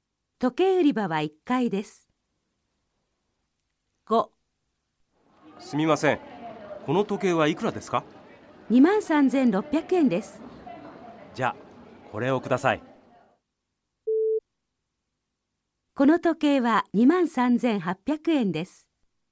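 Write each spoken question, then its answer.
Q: この時計は23,800円です。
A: ×(23,600円です)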